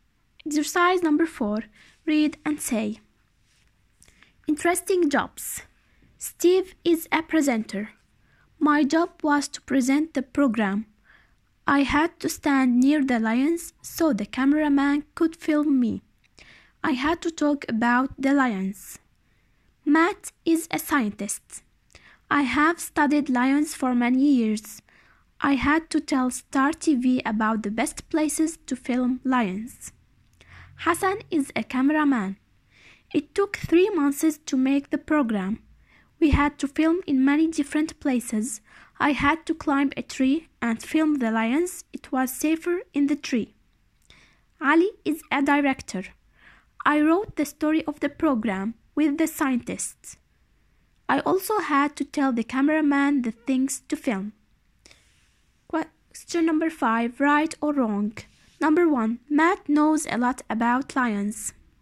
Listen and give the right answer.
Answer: The answer is right.